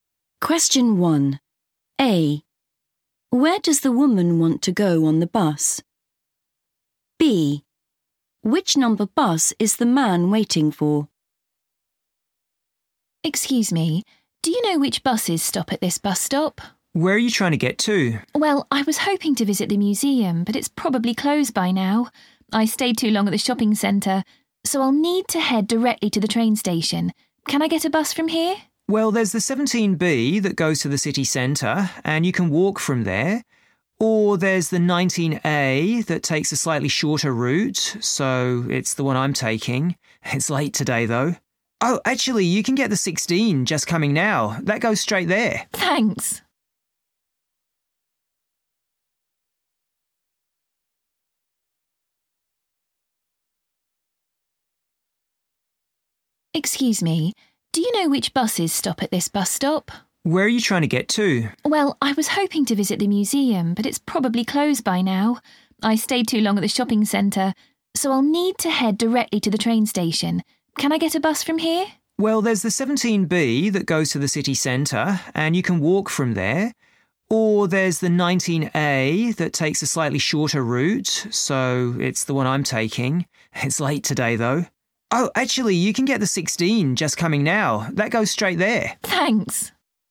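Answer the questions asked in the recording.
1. the train station
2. 19A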